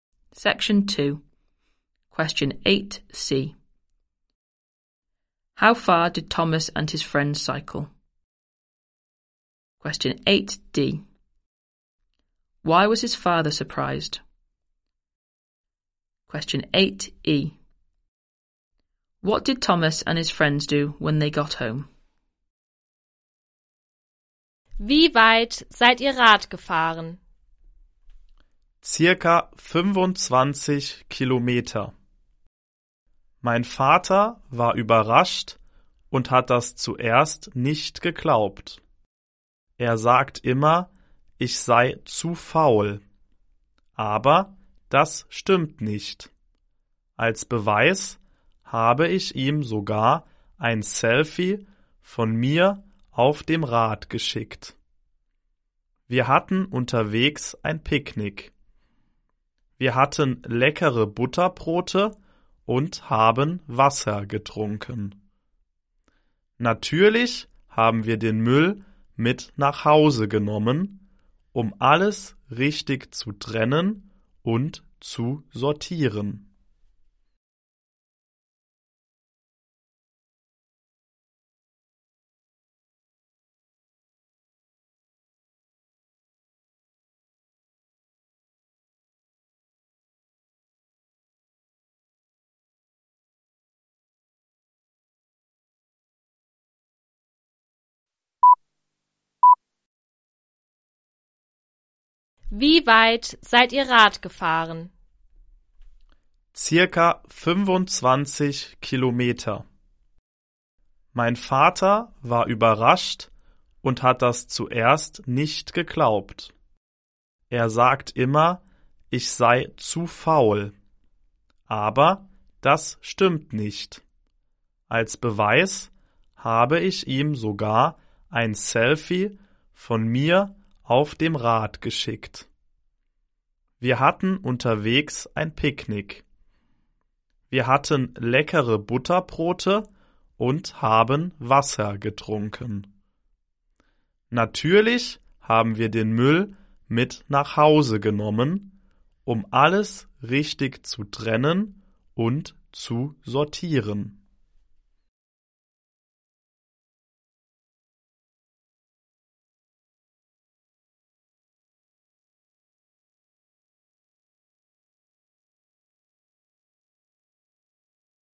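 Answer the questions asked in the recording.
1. About 25 kilometres
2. He always says Thomas is too lazy
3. Separated and sorted their rubbish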